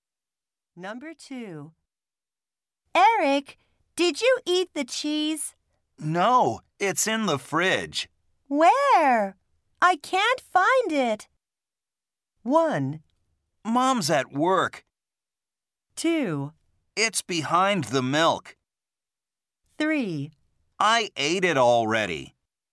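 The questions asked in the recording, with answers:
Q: Where? I can't find it.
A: 2: It's behind the milk.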